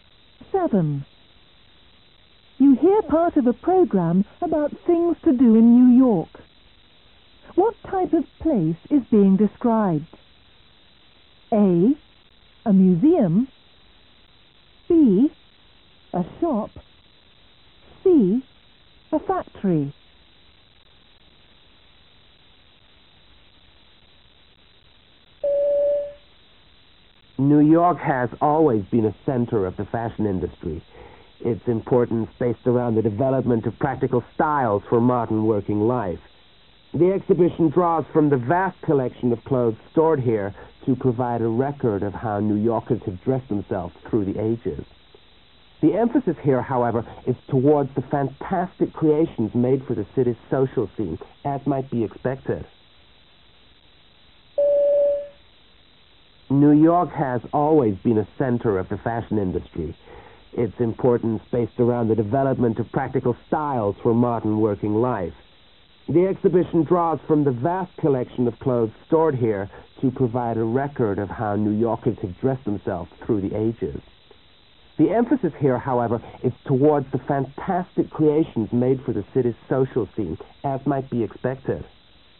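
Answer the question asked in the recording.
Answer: A: A museum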